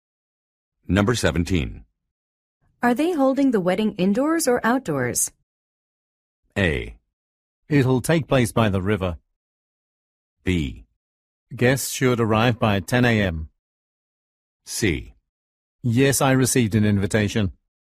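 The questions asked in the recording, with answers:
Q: Are they holding the wedding indoors or outdoors?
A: A: It'll take place by the river.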